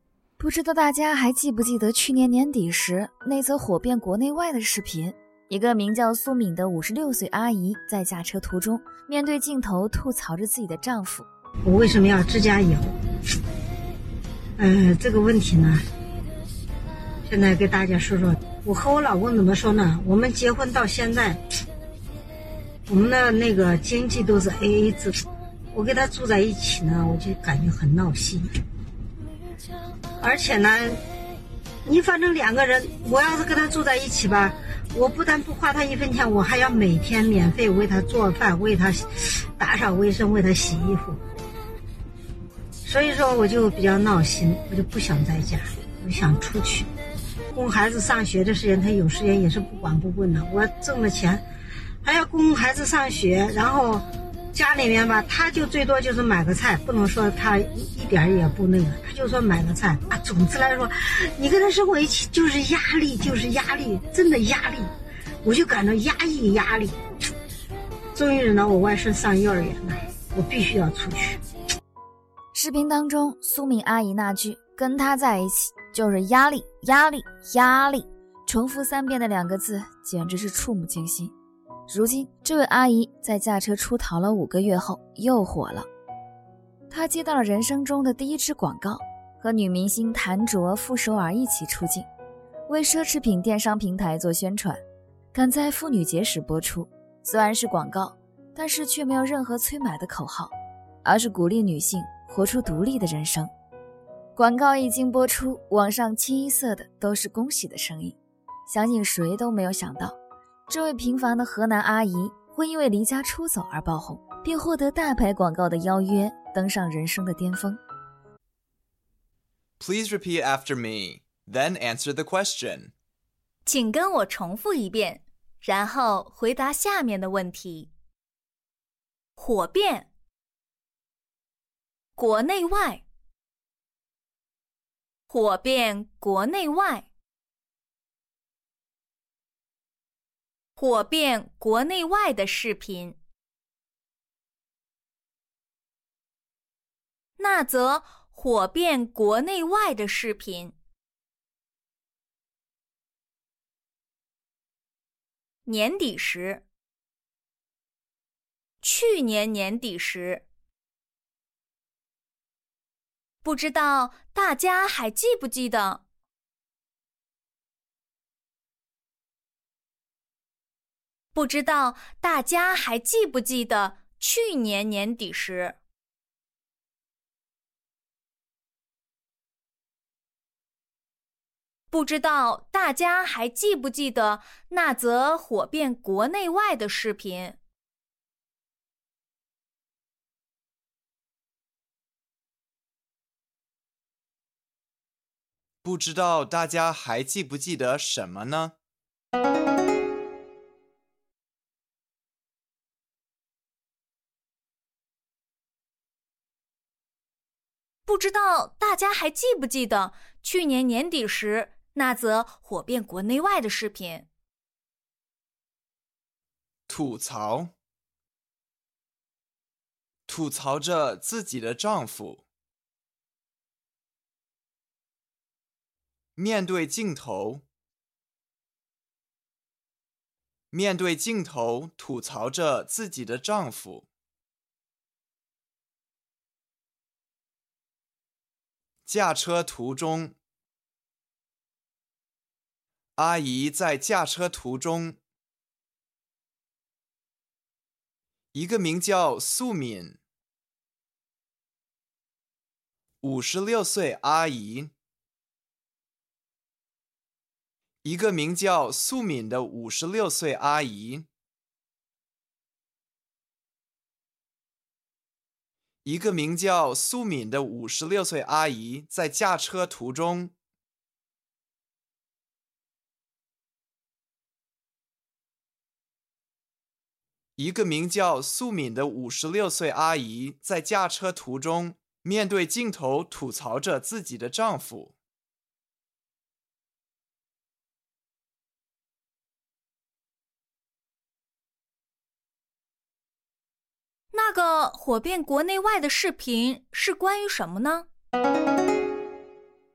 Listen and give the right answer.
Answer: 一个名叫苏敏的56岁阿姨在驾车途中面对镜头吐槽着自己的丈夫。